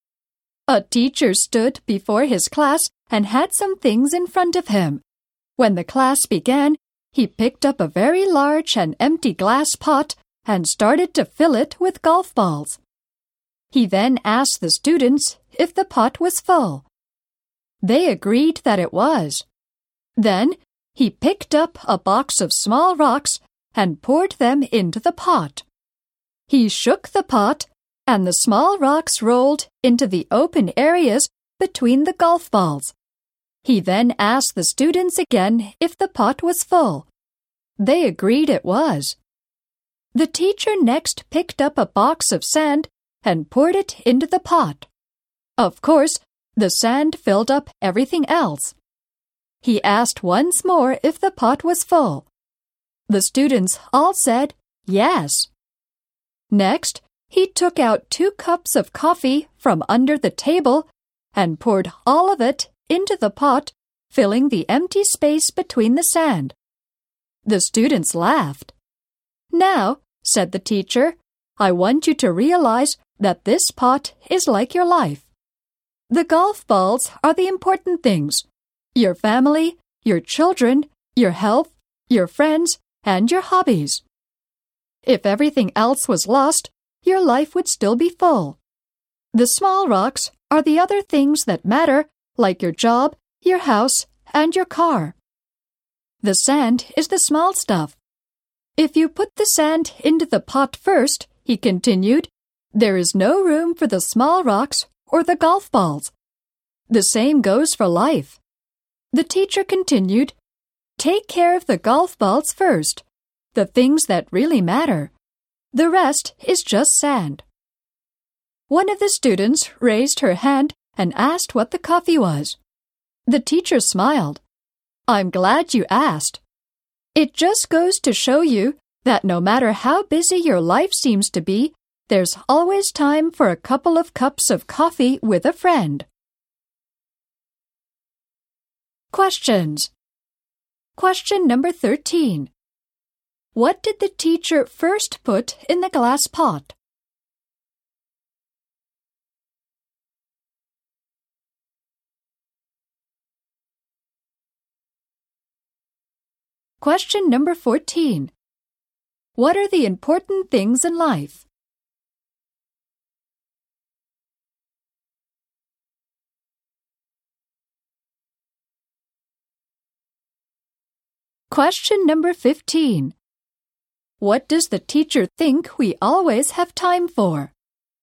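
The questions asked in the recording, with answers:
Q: What did the teacher first put in the glass pot?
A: Golf balls.

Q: What are the important things in life?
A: Family, children, health, friends and hobbies.

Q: What does the teacher think we always have time for?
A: A couple of cups of coffee with a friend.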